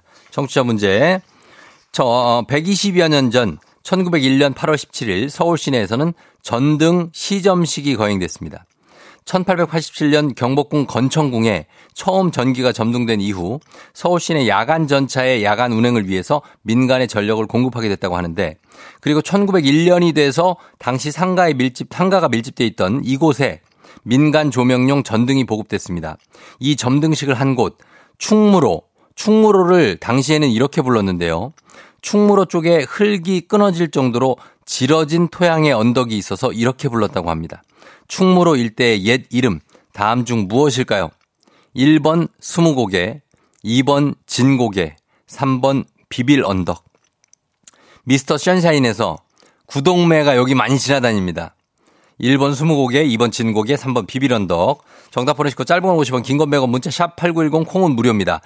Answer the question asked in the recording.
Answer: 정답은 바로 진고개입니다.